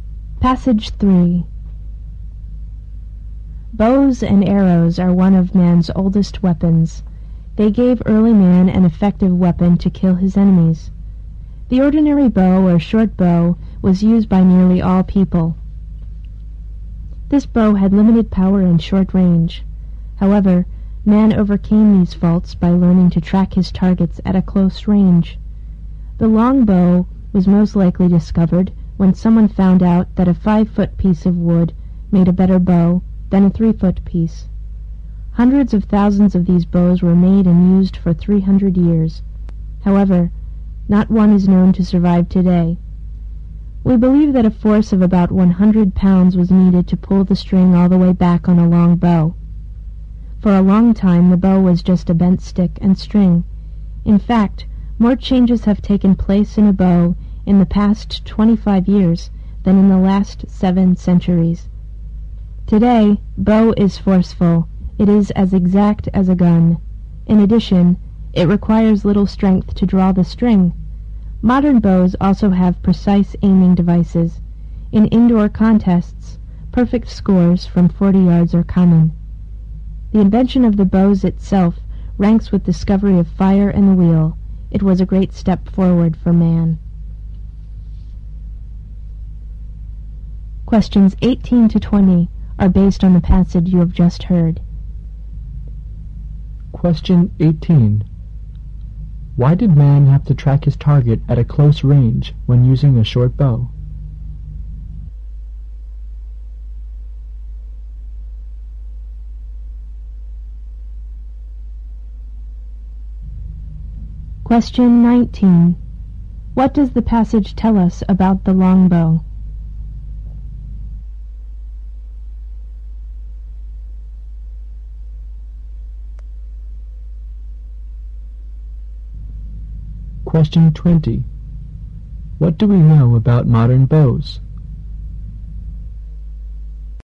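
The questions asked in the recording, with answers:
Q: Why did man have to track his target at a close range when using a short bow?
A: The short bow had limited power and short range.

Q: What does the passage tell us about the longbow?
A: It was used for 300 years, but none survives today; it took about 100 pounds of force to draw.

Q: What do we know about modern bows?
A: They are powerful and as accurate as a gun, take little strength to draw, and have precise aiming devices.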